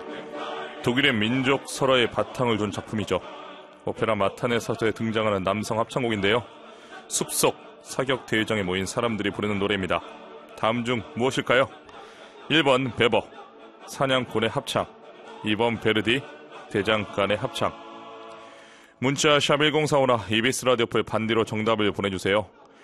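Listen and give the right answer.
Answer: 1: 베버, 사냥꾼의 합창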